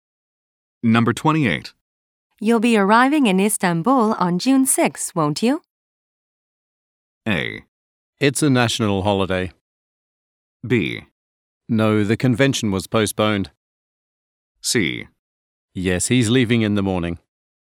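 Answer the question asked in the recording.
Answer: B: No, the convention was postponed.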